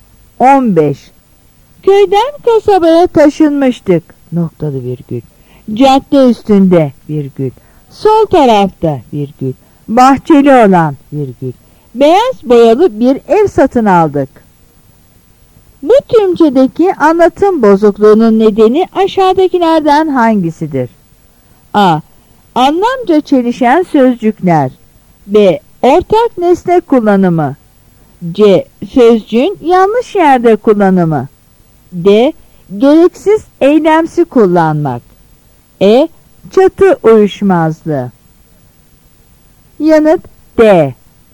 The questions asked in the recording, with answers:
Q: Bu tümcedeki anlatım bozukluğunun nedeni aşağıdakilerden hangisidir?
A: Yanıt D.